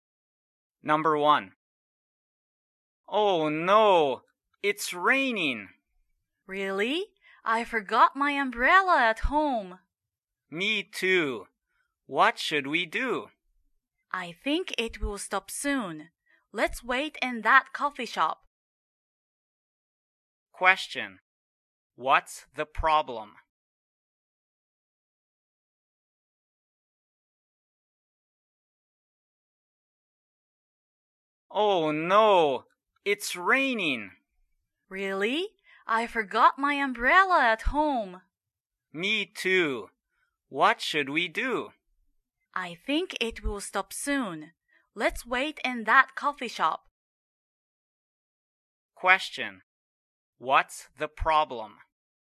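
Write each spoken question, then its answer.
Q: What's the problem?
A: It's raining and they forgot their umbrellas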